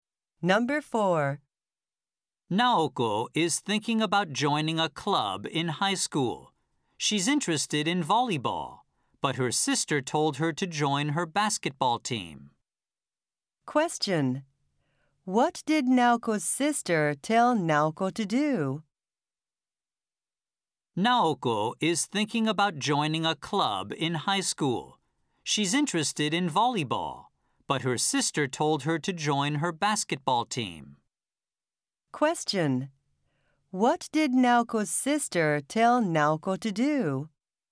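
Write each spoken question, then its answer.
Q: What did Naoko's sister tell Naoko to do?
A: Join her basketball team.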